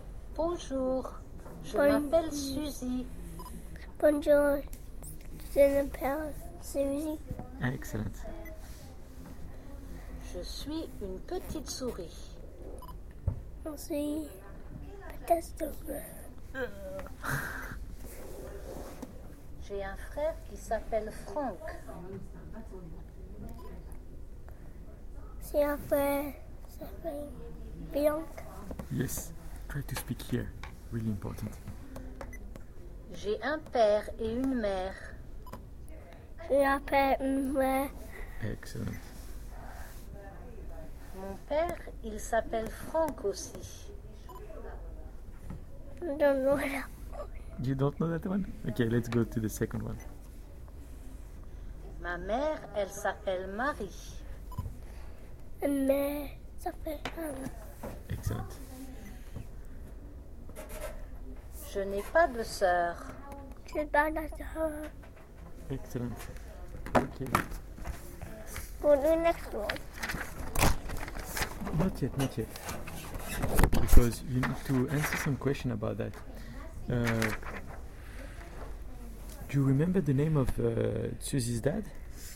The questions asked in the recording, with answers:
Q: Do you remember the name of Susie's dad?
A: Oh, it's Frank.